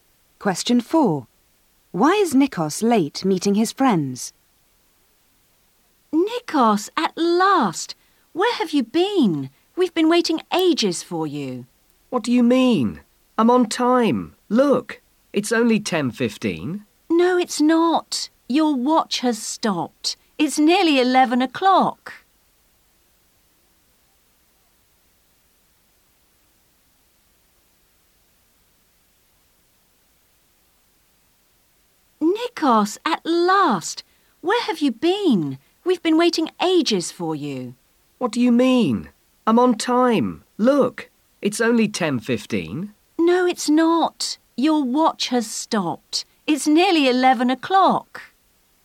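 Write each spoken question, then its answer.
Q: Why is Nikos late meeting his friends?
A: His watch has stopped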